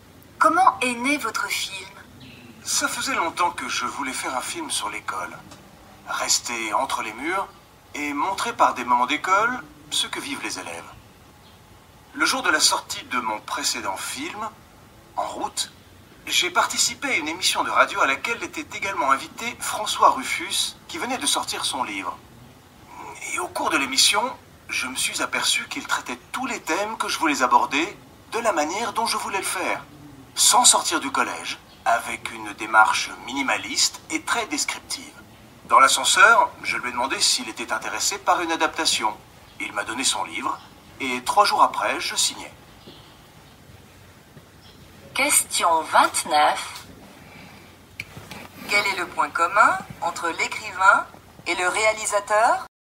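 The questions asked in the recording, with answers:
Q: Quel est le point commun entre l'écrivain et le réalisateur ?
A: Ils veulent traiter les mêmes thèmes sur l'école de la même manière : sans sortir du collège, avec une démarche minimaliste et très descriptive.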